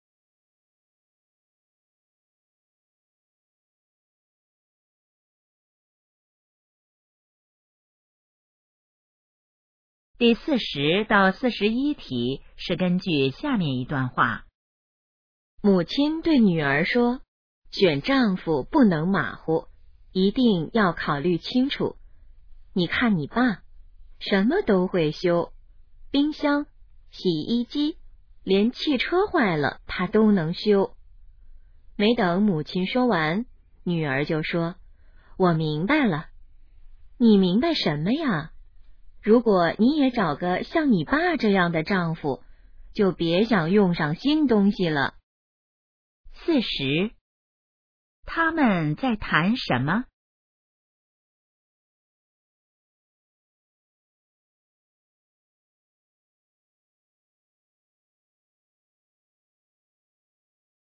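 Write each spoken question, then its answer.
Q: 他们在谈什么?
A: 选丈夫

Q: 关于爸爸,可以知道什么?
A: 什么都会修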